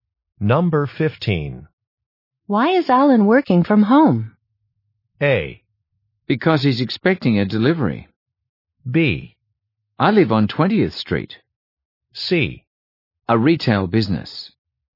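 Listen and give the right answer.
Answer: A: Because he's expecting a delivery.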